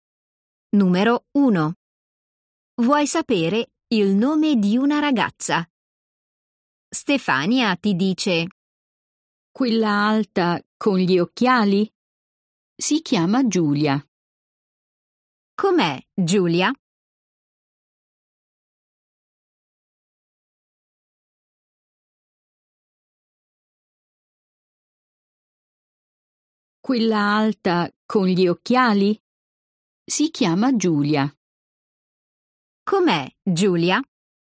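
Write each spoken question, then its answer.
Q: Com'è Giulia?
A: alta con gli occhiali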